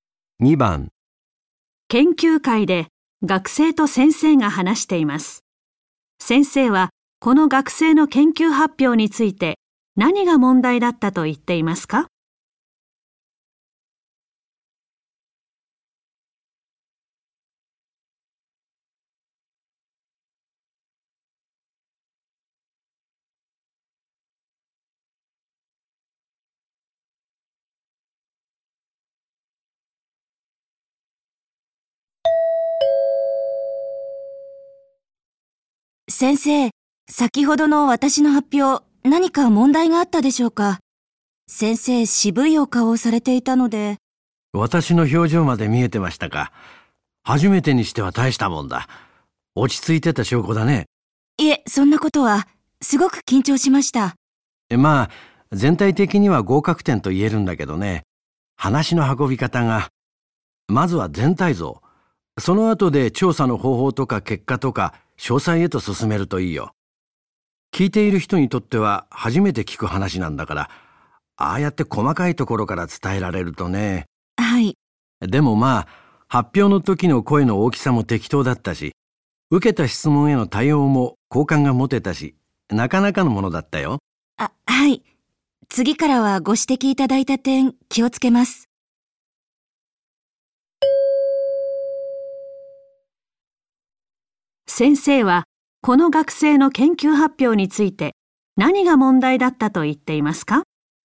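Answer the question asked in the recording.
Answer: 話の運び方(全体像からでなく細かいところから話したこと)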